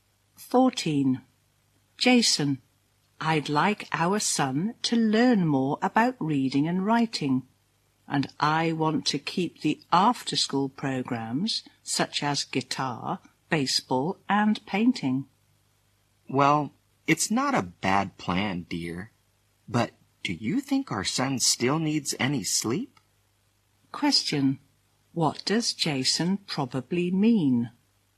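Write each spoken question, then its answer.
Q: What does Jason probably mean?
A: Their son would have too much to do and not enough time to sleep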